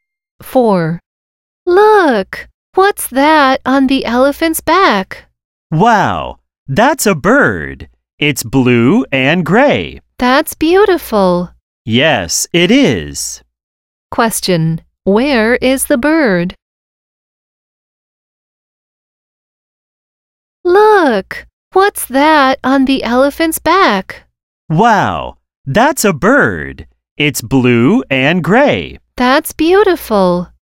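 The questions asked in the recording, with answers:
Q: where is the bird?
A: On the elephant's back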